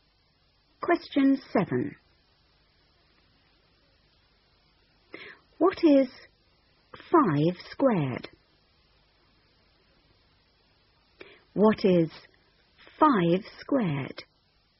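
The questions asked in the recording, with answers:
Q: What is 5 squared?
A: 25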